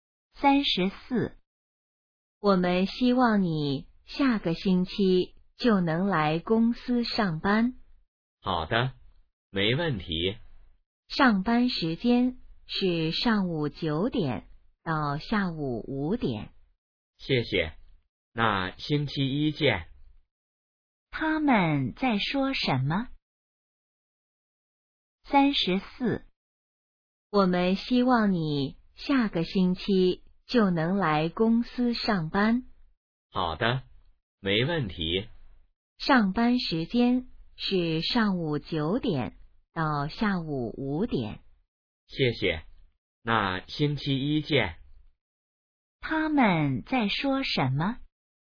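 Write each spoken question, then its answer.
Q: 他们在说什么?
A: 去公司上班的事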